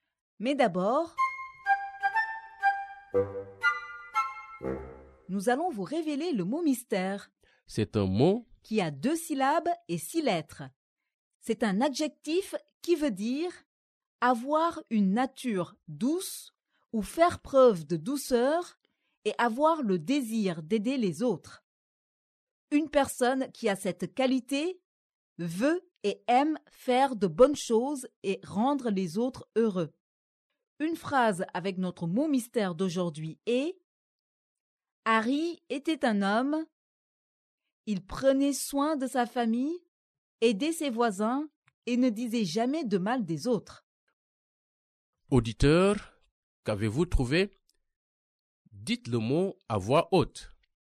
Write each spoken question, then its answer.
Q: Auditeur, qu'avez-vous trouvé?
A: Le mot mystère est « gentil ».